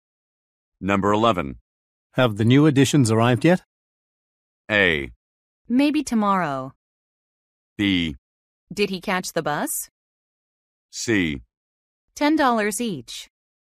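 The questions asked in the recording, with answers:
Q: Have the new additions arrived yet?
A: A: Maybe tomorrow.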